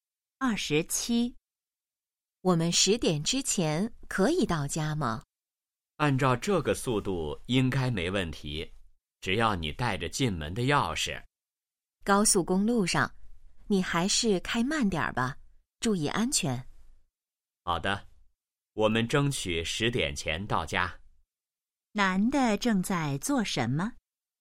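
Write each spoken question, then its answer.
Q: 男的正在做什么?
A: 开车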